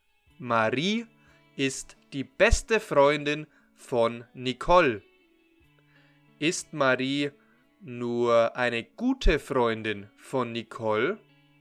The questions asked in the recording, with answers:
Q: Ist Marie nur eine gute Freundin von Nicole?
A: Nein, Marie ist nicht nur eine gute Freundin von Nicole.